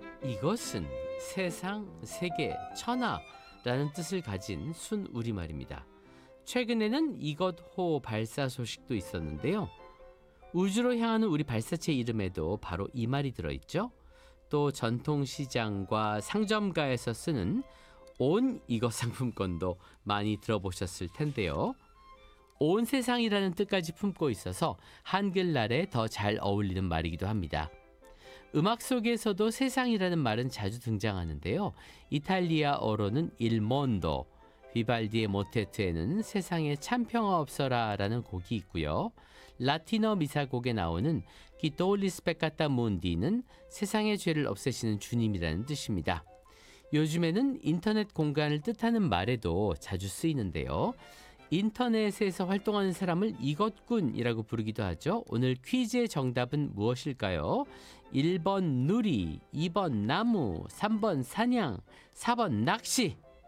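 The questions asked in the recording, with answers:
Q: 오늘 퀴즈의 정답은 무엇일까요? 1번 누리, 2번 나무, 3번 사냥, 4번 낚시.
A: 1번: 누리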